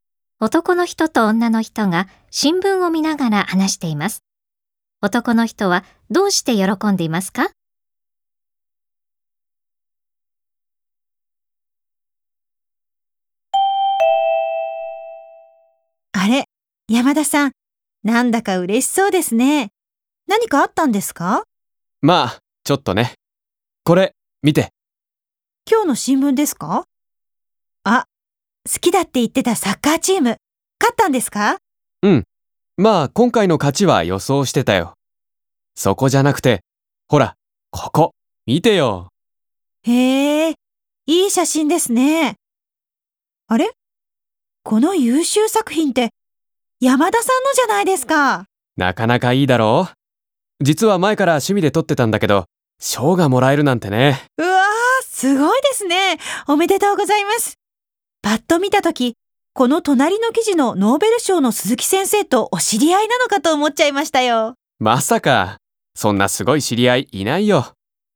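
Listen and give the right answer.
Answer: 自分が撮った写真が新聞で優秀作品に選ばれ、賞をもらったから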